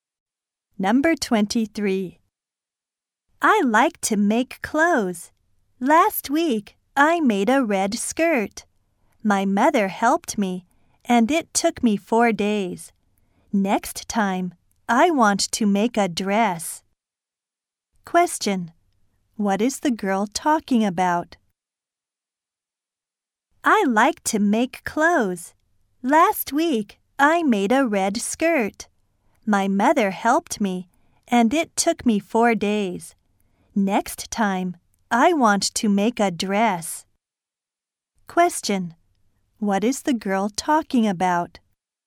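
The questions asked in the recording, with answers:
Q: What is the girl talking about?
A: Making clothes (a red skirt she made).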